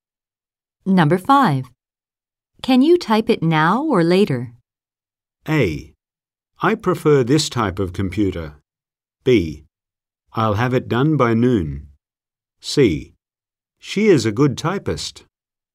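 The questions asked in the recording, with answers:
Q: Can you type it now or later?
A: B: I'll have it done by noon.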